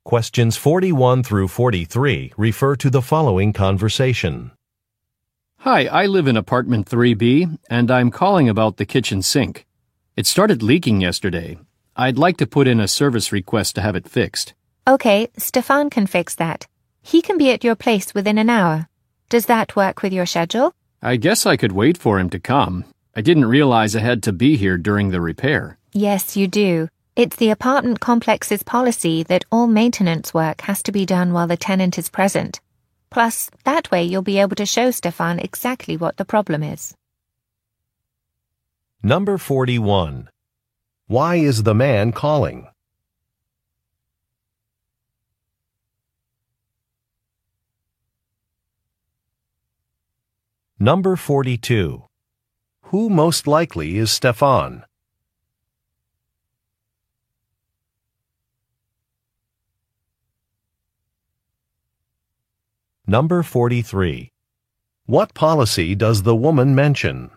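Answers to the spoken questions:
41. To request a repair for a leaking kitchen sink
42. A maintenance worker
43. Tenants must be present during maintenance work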